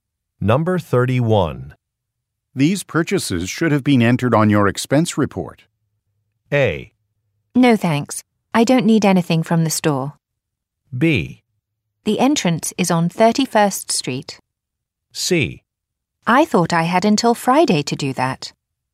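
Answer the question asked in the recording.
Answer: C: I thought I had until Friday to do that.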